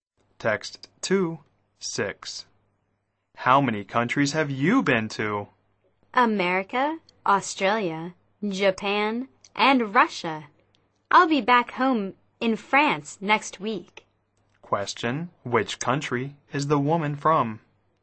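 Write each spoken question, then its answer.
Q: Question, which country is the woman from?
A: France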